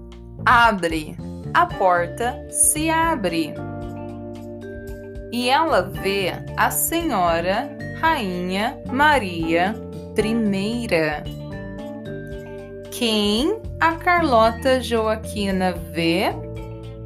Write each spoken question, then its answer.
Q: Quem a Carlota Joaquina vê?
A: a Senhora Rainha Maria I.